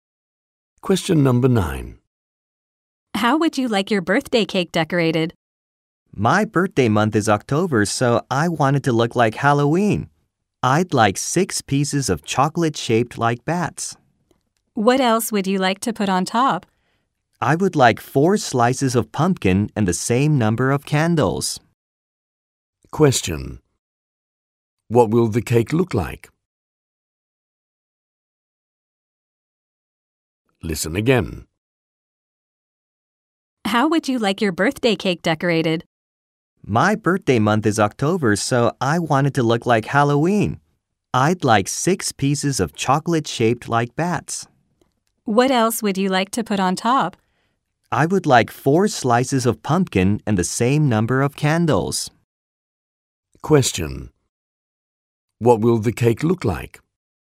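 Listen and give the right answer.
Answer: 6 chocolate bats, 4 pumpkin slices and 4 candles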